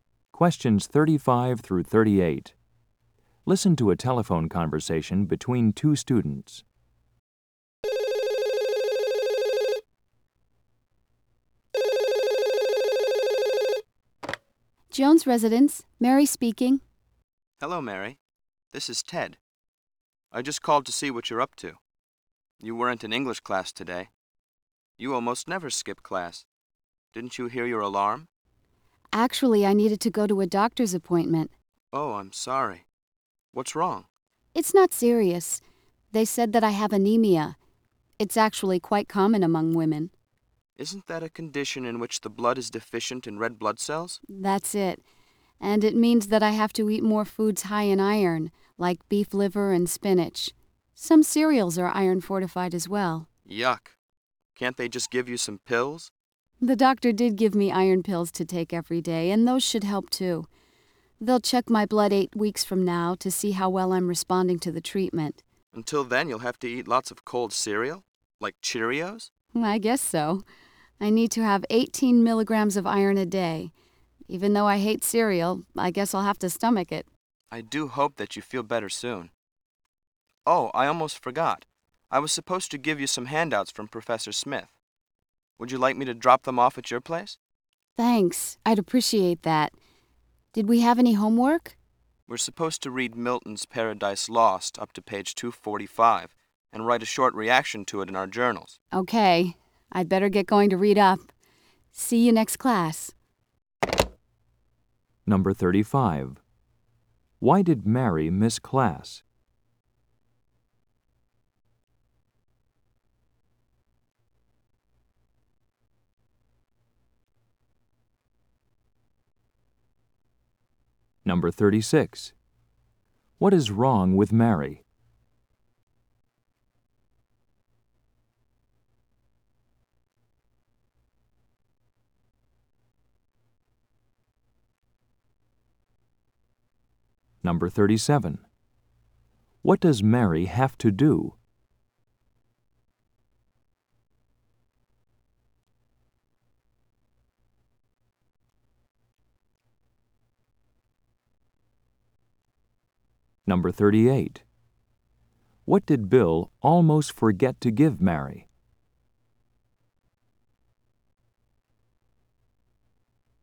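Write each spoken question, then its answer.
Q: Why did Mary miss class?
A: She had a doctor's appointment

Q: What is wrong with Mary?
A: She has anemia

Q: What does Mary have to do?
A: Eat foods high in iron and take iron pills

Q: What did Bill almost forget to give Mary?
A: Handouts from Professor Smith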